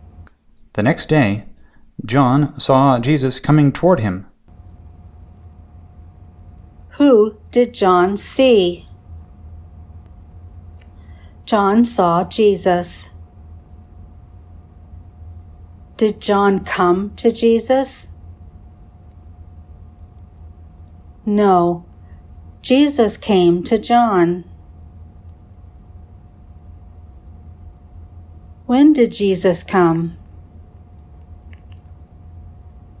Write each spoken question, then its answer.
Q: When did Jesus come?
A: Jesus came the next day.